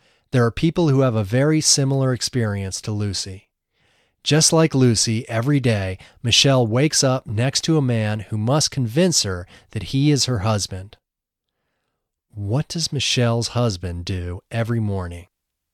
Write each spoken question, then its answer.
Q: What does Michelle's husband do every morning?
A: Michelle's husband convinces her every morning that he is her husband.